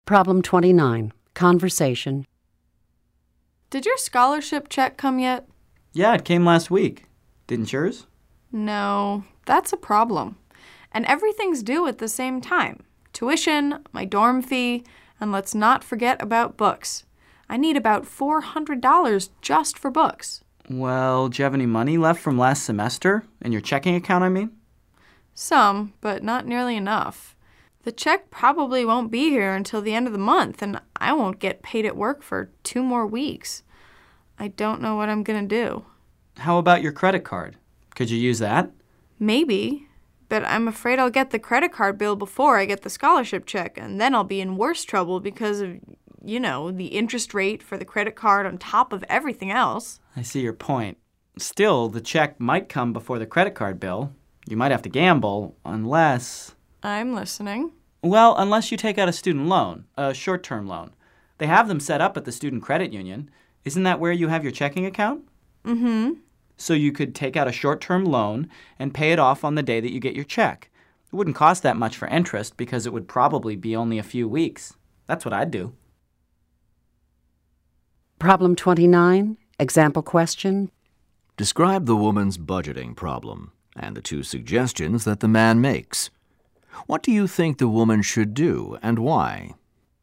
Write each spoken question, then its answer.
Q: Describe the woman's budgeting problem and the two suggestions that the man makes.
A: The woman doesn't have enough money for her expenses.